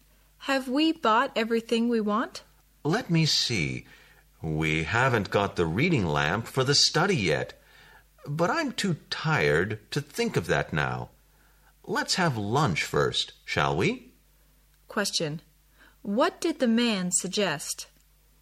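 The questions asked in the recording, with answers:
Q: What did the man suggest?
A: Having lunch first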